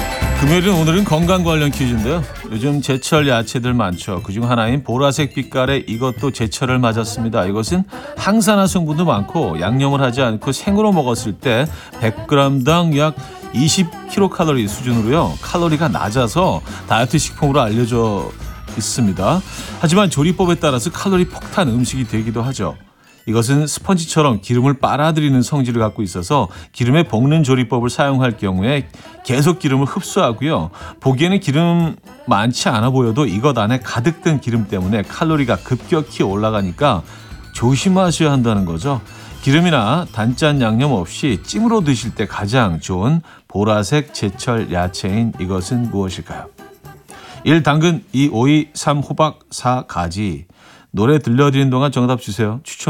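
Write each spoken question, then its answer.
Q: 기름이나 단짠 양념 없이 찜으로 드실 때 가장 좋은 보라색 제철 야채인 이것은 무엇일까요?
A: 4: 가지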